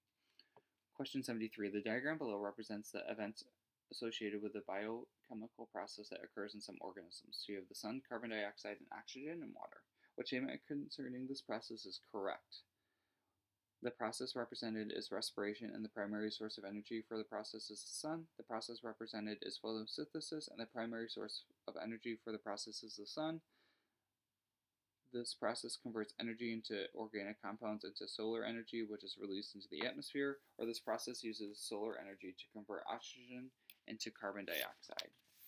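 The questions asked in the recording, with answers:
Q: What statement concerning this process is correct?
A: The process represented is photosynthesis, and the primary source of energy for the process is the sun.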